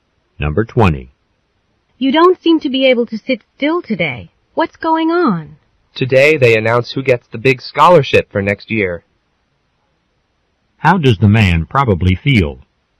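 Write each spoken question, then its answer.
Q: How does the man probably feel?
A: Nervous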